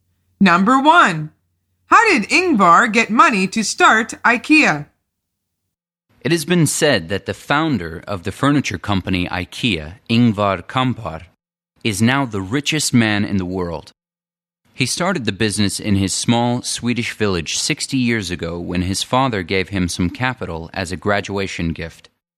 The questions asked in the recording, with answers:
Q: How did Ingvar get money to start IKEA?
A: from his father.